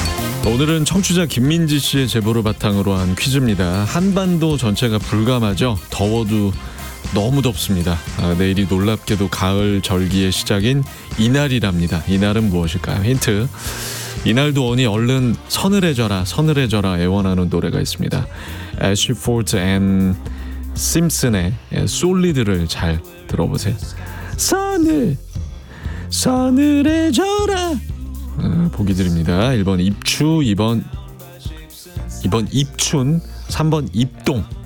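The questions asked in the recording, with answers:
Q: 이날은 무엇일까요?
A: 1: 입추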